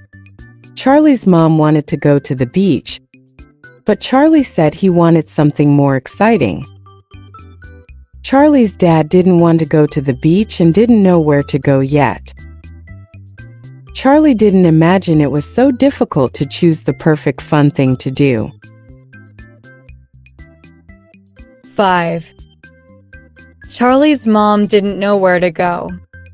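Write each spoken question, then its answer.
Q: Charlie's mom didn't know where to go.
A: False: it was Charlie's dad who didn't know where to go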